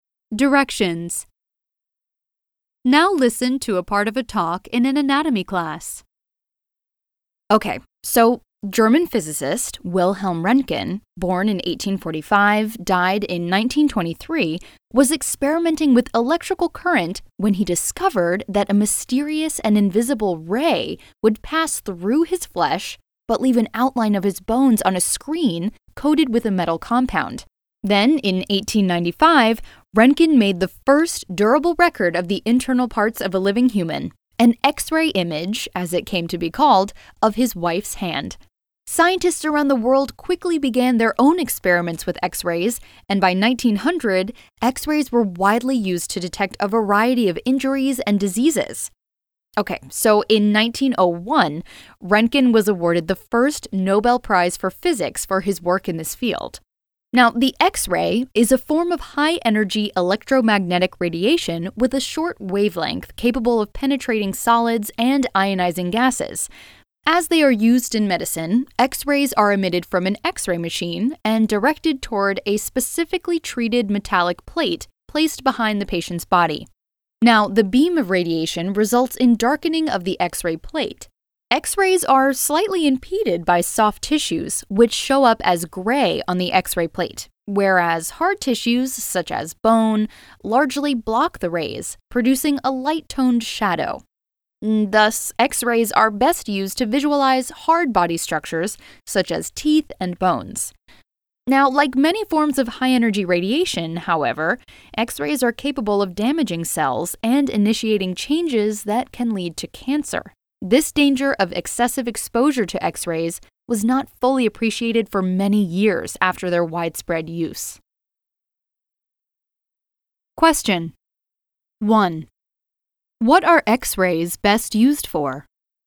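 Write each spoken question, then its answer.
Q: What are X-rays best used for?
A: To visualize hard body structures, such as teeth and bones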